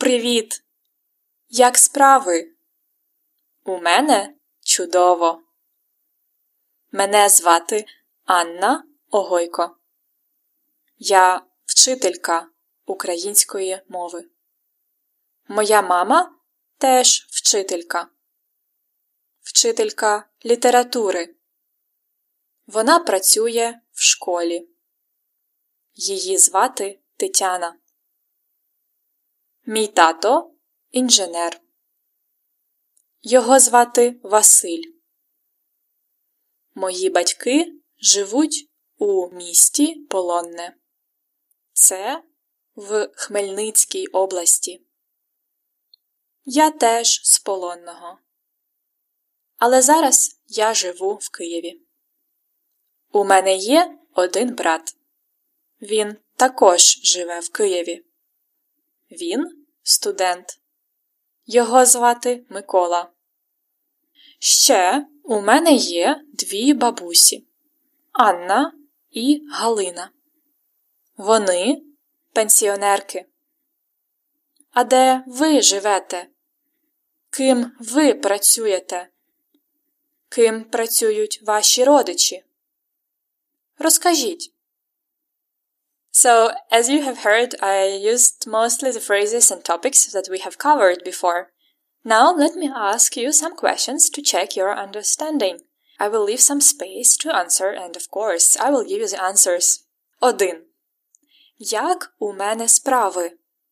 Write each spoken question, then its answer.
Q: Як у мене справи?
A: I'm doing great.